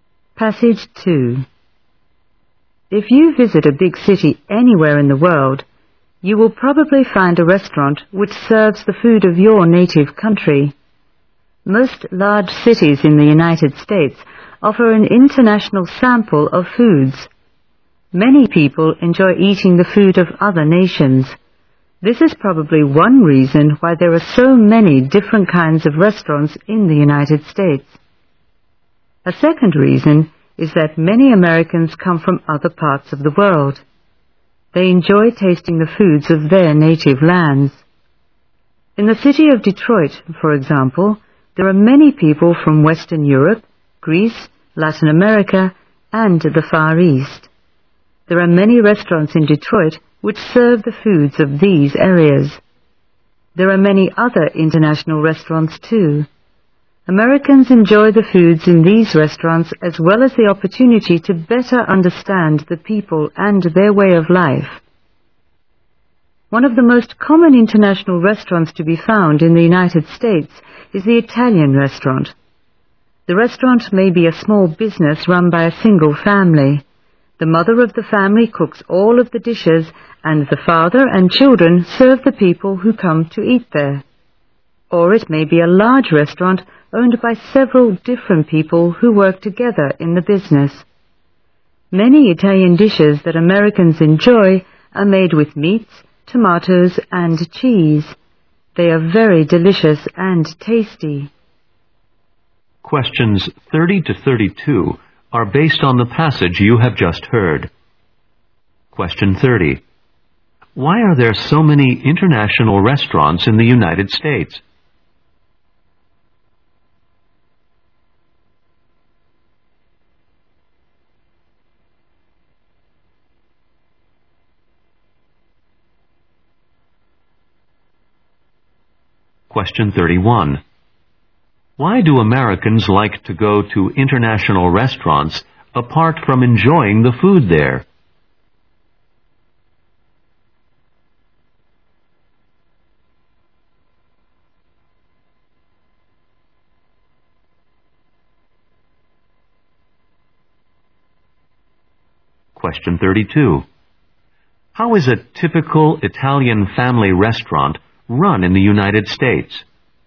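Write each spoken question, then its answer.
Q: Why are there so many international restaurants in the United States?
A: People enjoy foreign food and many Americans come from other parts of the world.

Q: Why do Americans like to go to international restaurants apart from enjoying the food there?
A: To better understand other peoples and their way of life.

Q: How is a typical Italian family restaurant run in the United States?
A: The mother cooks, and the father and children serve the customers.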